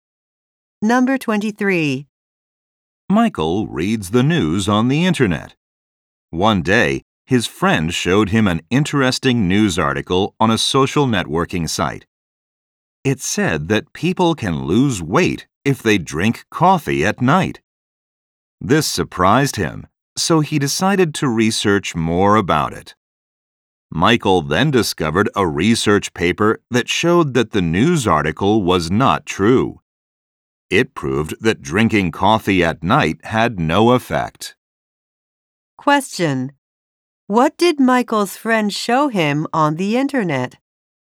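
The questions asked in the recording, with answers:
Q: What did Michael's friend show him on the internet?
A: A news article saying drinking coffee at night helps people lose weight.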